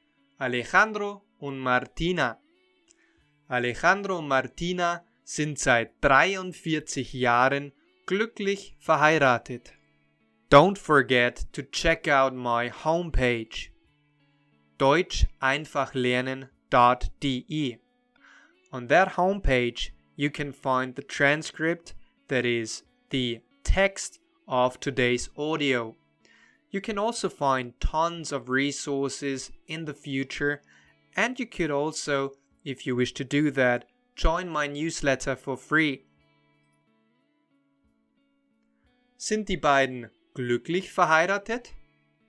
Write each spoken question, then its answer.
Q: Sind die beiden glücklich verheiratet?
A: Ja, sie sind glücklich verheiratet.